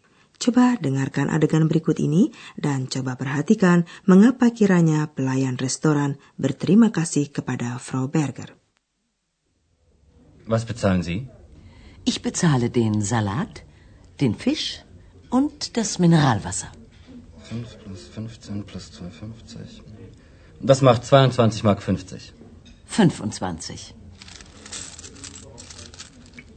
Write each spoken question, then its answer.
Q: coba perhatikan mengapa kiranya pelayan restoran berterima kasih kepada Frau Berger.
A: pelayan itu mengucapkan terima kasih kepada Frau Berger karena diberi uang persen.